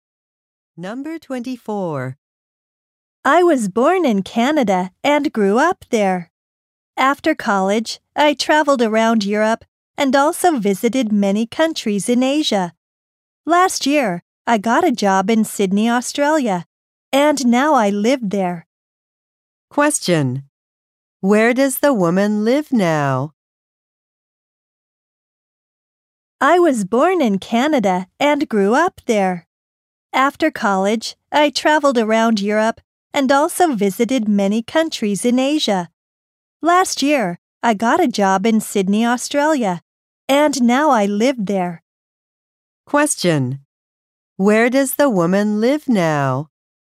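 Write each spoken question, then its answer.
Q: Where does the woman live now?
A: In Sydney, Australia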